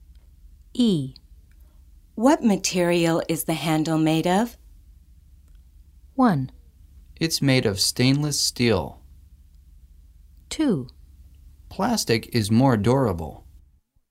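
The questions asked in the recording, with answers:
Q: What material is the handle made of?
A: 1: It's made of stainless steel.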